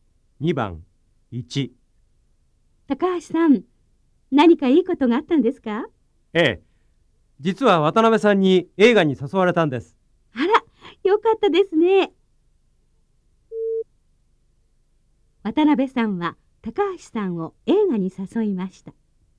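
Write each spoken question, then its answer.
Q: 渡辺さんは高橋さんを映画に誘いました。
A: ○(正しい)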